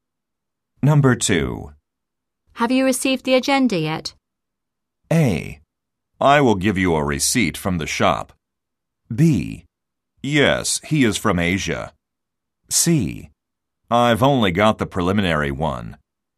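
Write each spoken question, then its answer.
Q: Have you received the agenda yet?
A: C: I've only got the preliminary one.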